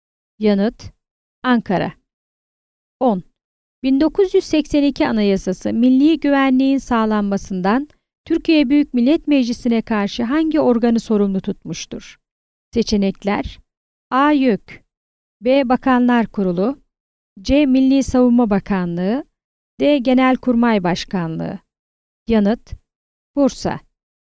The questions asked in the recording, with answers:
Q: 1982 Anayasası milli güvenliğin sağlanmasından Türkiye Büyük Millet Meclisi'ne karşı hangi organı sorumlu tutmuştur?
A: Yanıt: Bursa.